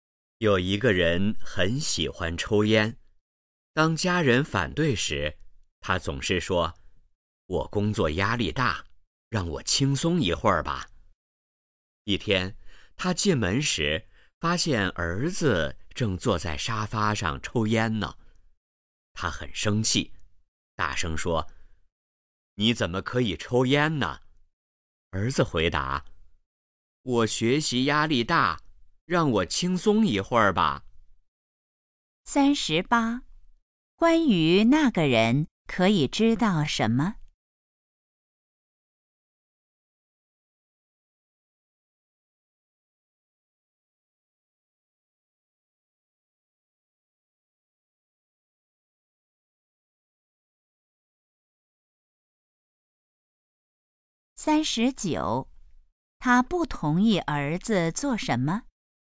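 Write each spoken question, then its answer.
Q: 他不同意儿子做什么?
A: 抽烟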